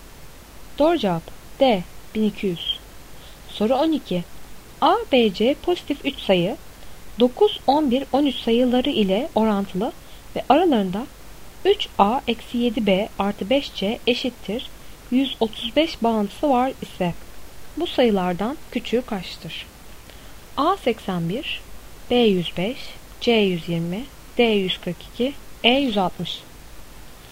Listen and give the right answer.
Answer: Doğru cevap A 81.